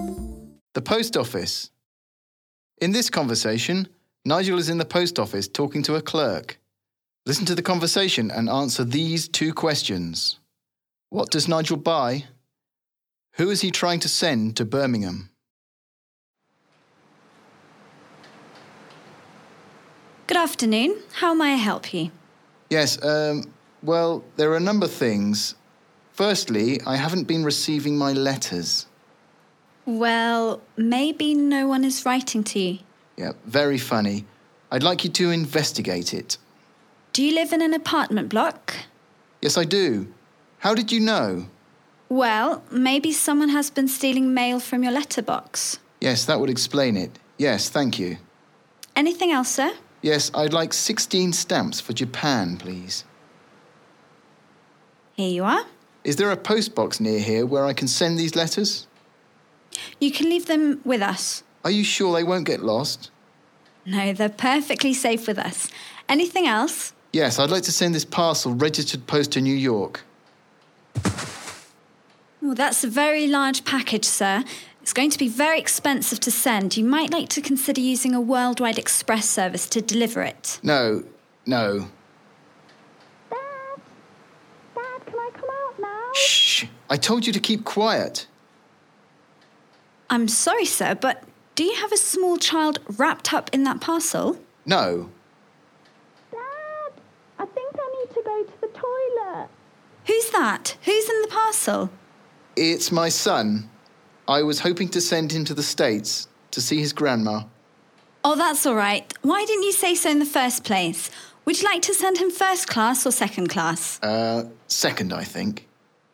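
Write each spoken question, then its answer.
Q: What does Nigel buy?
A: 16 stamps for Japan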